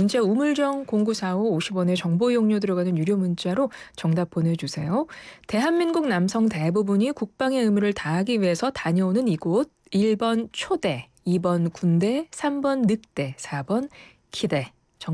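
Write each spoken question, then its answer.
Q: 대한민국 남성 대부분이 국방의 의무를 다하기 위해서 다녀오는 이곳.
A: 2: 군대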